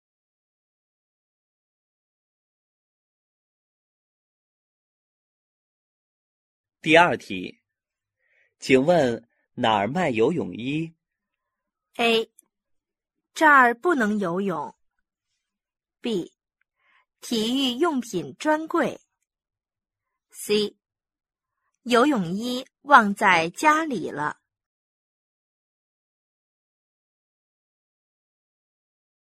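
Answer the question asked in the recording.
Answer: B: 体育用品专柜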